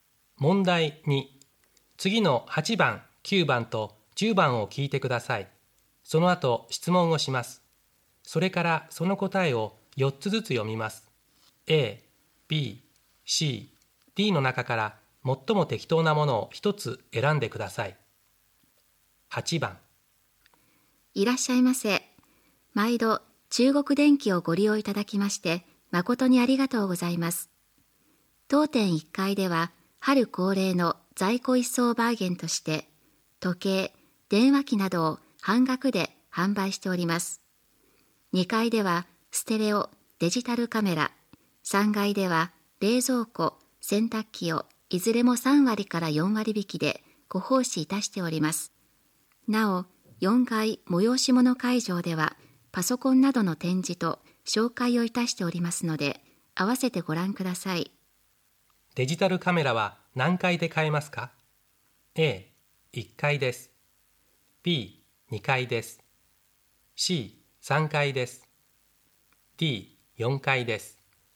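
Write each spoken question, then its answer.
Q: デジタルカメラは何階で買えますか ?A、1階です。B、2階です。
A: B: 2階です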